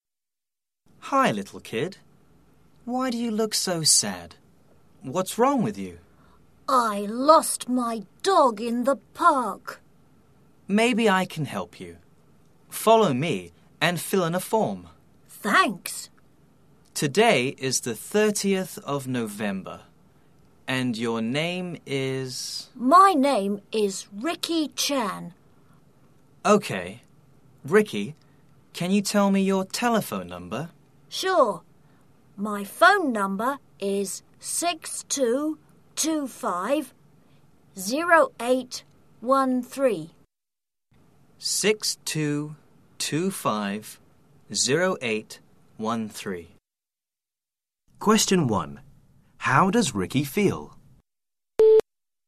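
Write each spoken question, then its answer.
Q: How does Ricky feel?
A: Sad (he lost his dog in the park)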